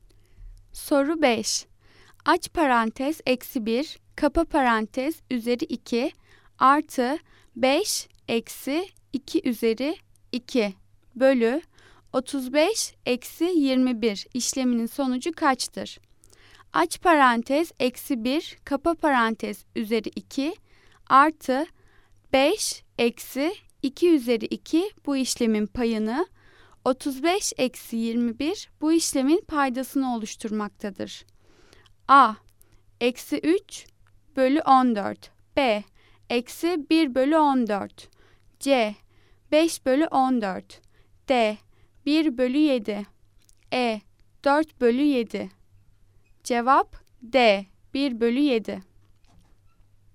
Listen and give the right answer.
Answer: Cevap D. 1 bölü 7.